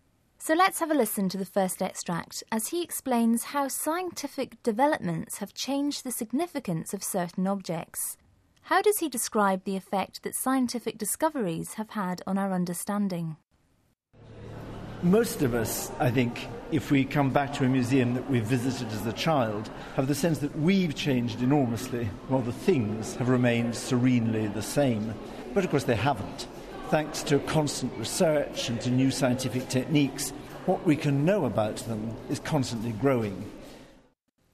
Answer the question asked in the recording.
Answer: OK, well, he says that what we know about the objects is constantly growing.